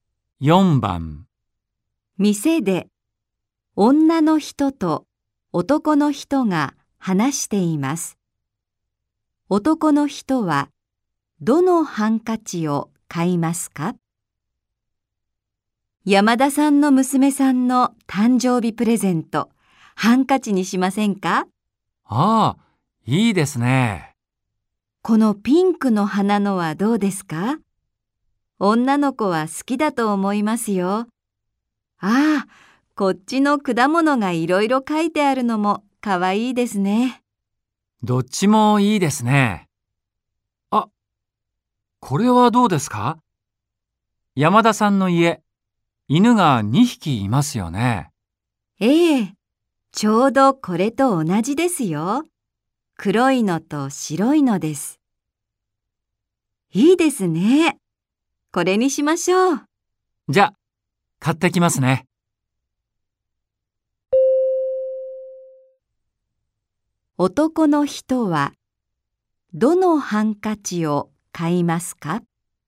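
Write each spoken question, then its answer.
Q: 男の人はどのハンカチを買いますか?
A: 黒い犬と白い犬の絵のハンカチ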